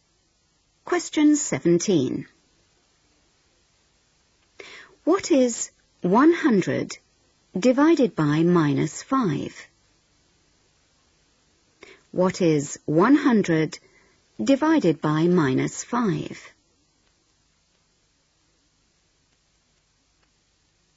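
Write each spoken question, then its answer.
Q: What is 100 divided by minus 5?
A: -20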